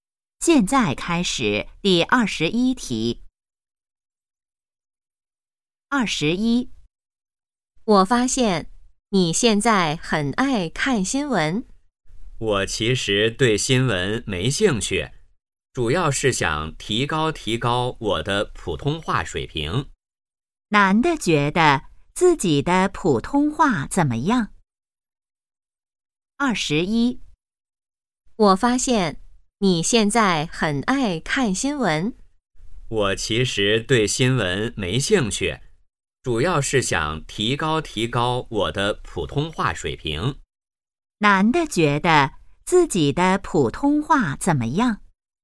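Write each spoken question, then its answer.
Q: 男的觉得自己的普通话怎么样?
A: 需要提高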